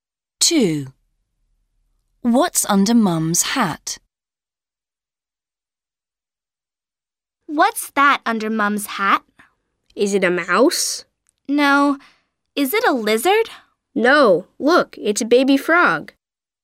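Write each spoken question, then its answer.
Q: What's under Mum's hat?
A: A baby frog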